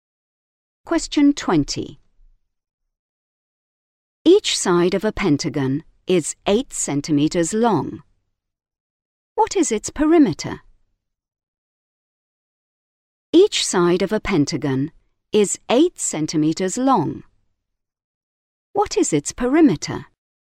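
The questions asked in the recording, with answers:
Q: What is its perimeter?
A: 40 centimeters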